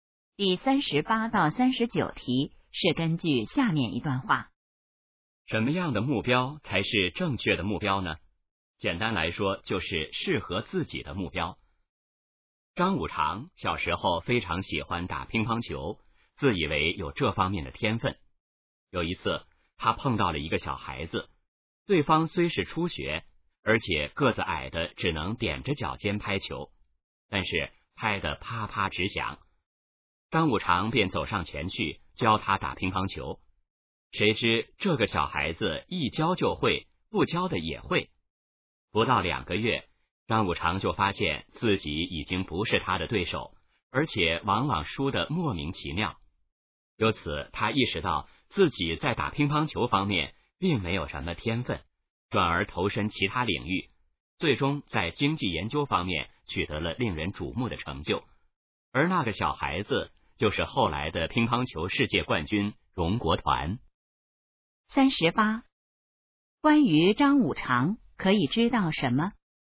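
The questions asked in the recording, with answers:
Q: 这段话主要想说明什么?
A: 要选择适合自己的目标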